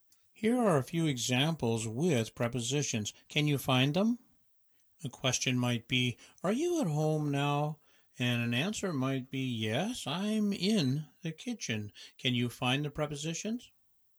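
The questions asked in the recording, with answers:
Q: Can you find the prepositions?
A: at, in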